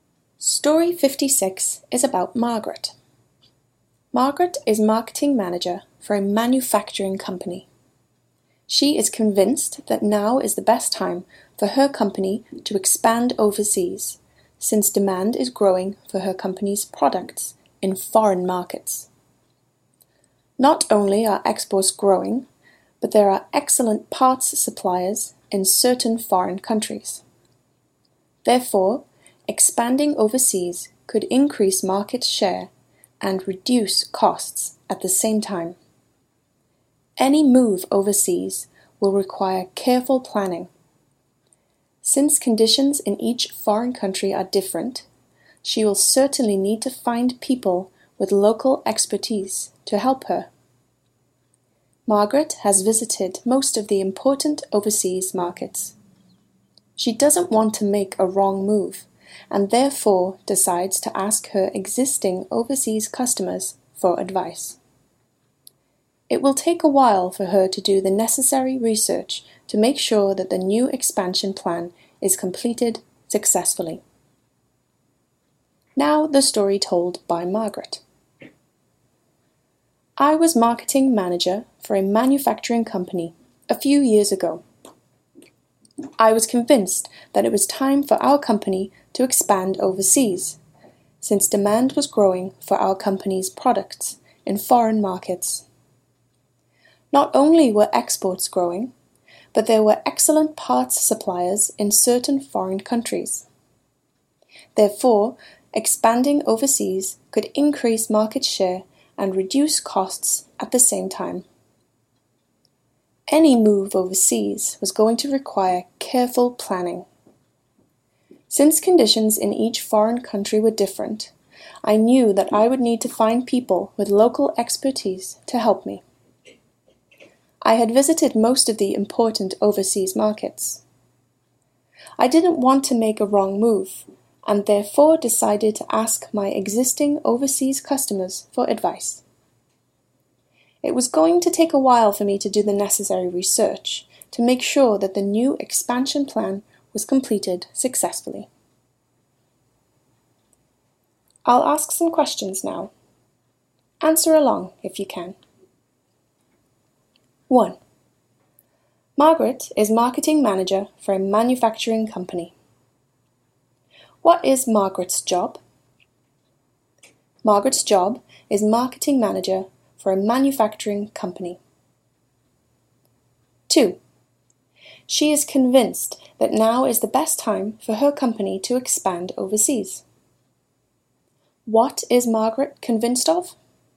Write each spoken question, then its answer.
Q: What is Margaret convinced of?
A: She is convinced that now is the best time for her company to expand overseas.